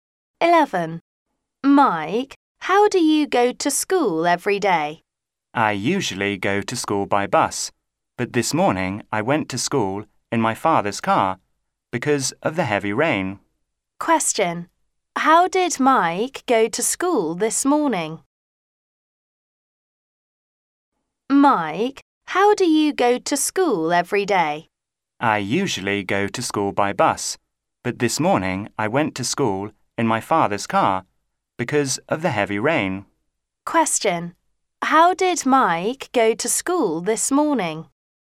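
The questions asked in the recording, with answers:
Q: How did Mike go to school this morning?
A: In his father's car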